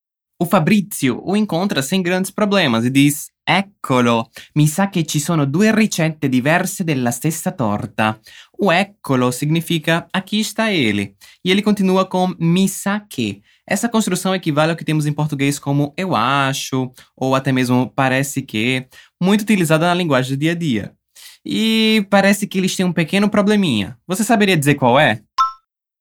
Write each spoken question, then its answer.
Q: Você saberia dizer qual é?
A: Pois é, temos duas receitas diferentes da mesma torta.